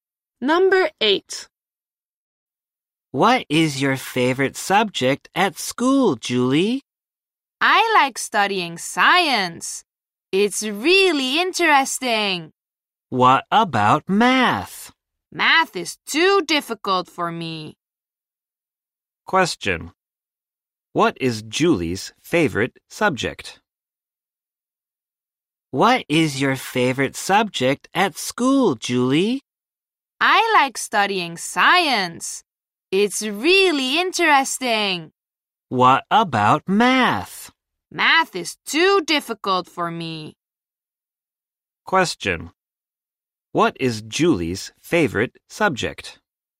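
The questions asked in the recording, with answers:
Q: What is Julie's favorite subject?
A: Science.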